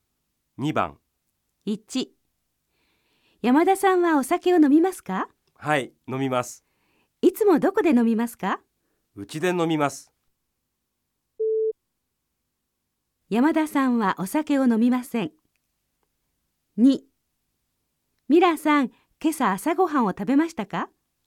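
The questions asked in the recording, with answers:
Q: 山田さんはお酒を飲みません。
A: ×(違います。山田さんはお酒を飲みます)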